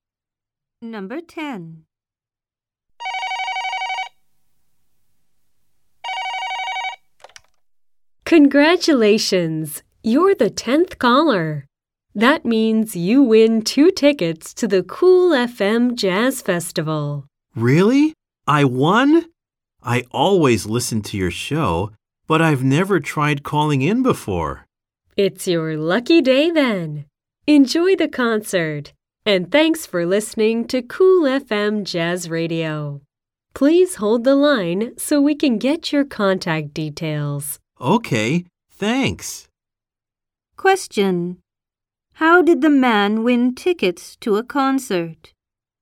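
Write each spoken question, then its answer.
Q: How did the man win tickets to a concert?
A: He was the 10th caller to the radio station.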